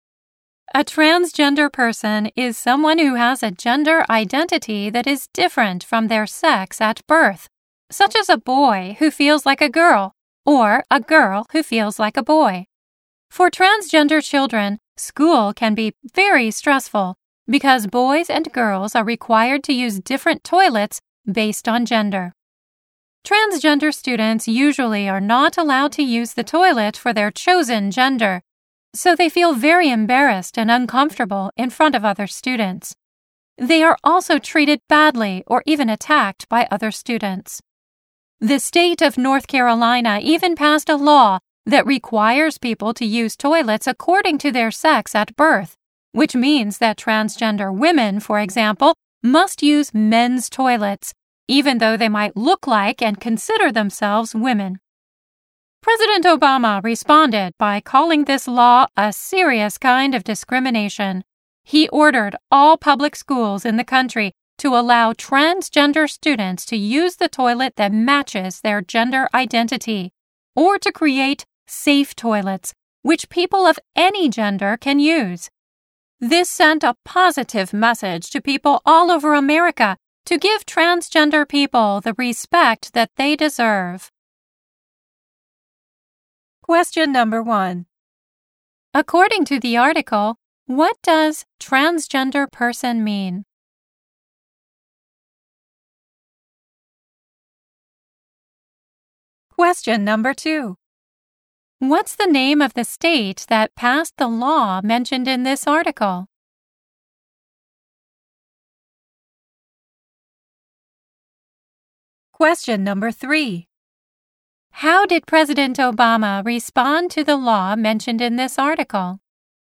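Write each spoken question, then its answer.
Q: According to the article, what does transgender person mean?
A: Someone whose gender identity is different from their sex at birth

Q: What's the name of the state that passed the law mentioned in this article?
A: North Carolina

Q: How did President Obama respond to the law mentioned in this article?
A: He called it a serious kind of discrimination and ordered public schools to let transgender students use the toilet matching their gender identity or create safe toilets for any gender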